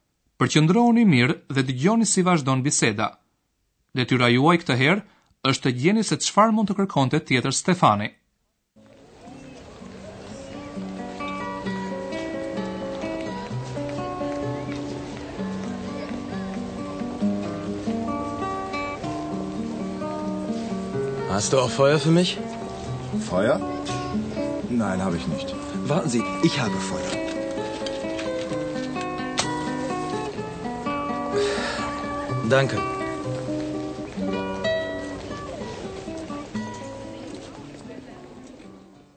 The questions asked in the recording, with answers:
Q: Detyra juaj këtë herë është të gjeni se çfarë mund të kërkonte tjetër Stefani.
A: Kur do të pish cigare, të duhet edhe shkrepsja.